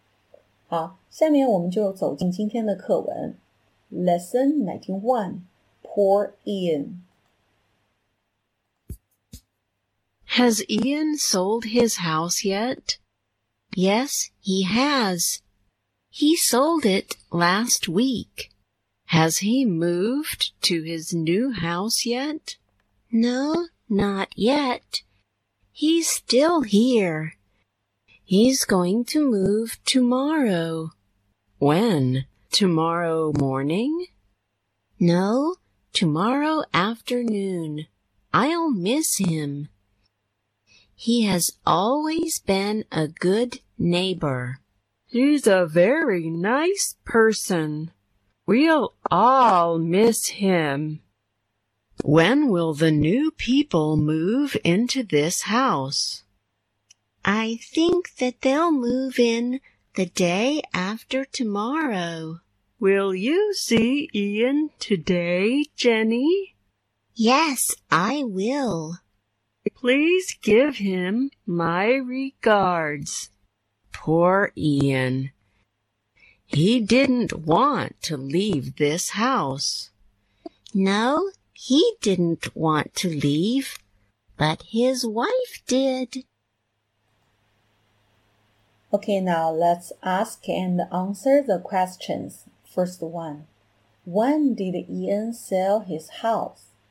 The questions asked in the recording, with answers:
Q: First one, when did Ian sell his house?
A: Last week.